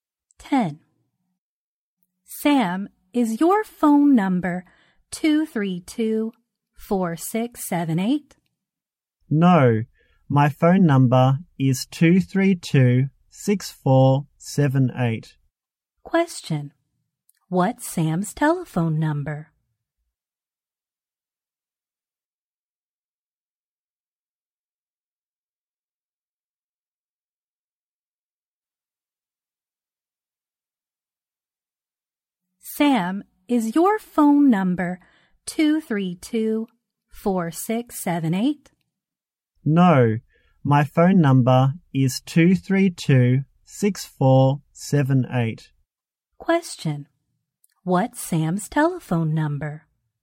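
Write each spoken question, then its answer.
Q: What's Sam's telephone number?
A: 232-6478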